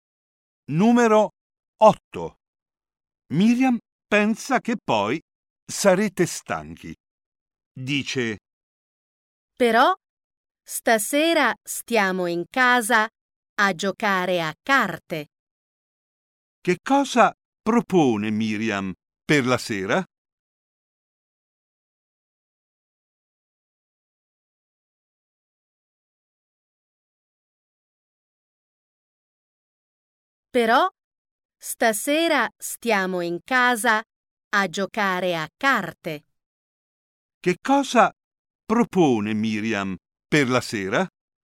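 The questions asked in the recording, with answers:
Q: Che cosa propone Miriam per la sera?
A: Stare in casa a giocare a carte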